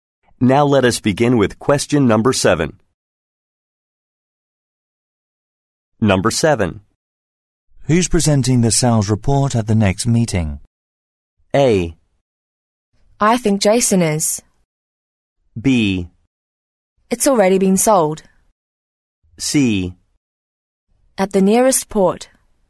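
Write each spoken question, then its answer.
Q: Who's presenting the sales report at the next meeting?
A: A: I think Jason is.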